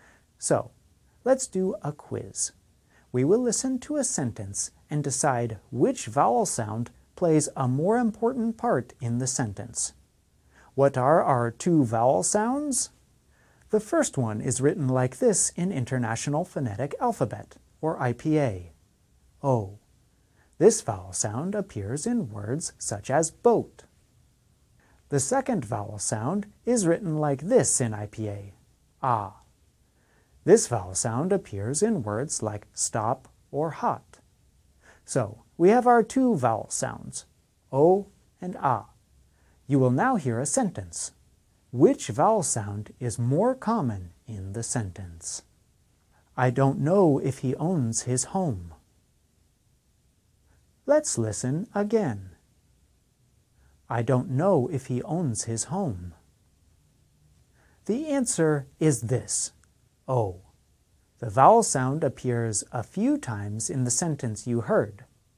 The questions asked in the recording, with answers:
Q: Which vowel sound is more common in the sentence?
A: The answer is this, This vowel sound appears many times in the sentence you heard.